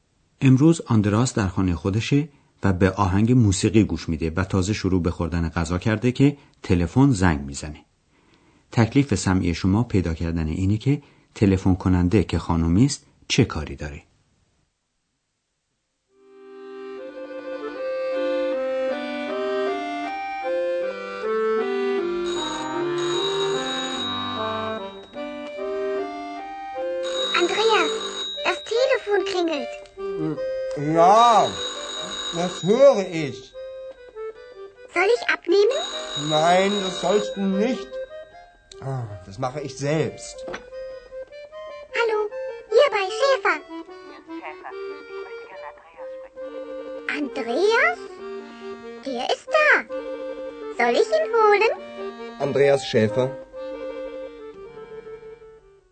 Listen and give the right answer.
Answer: خانومی که تلفن میکنه میخواد با آندراس صحبت کنه.